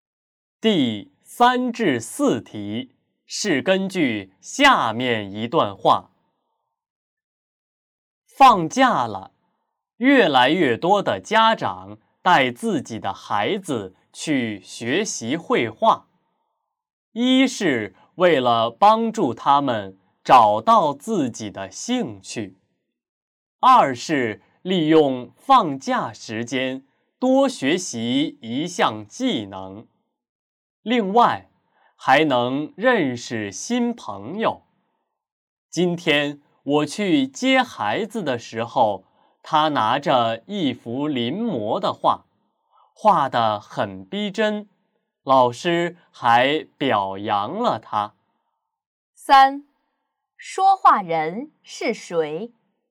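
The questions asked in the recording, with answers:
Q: 三,说话人是谁?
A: 家长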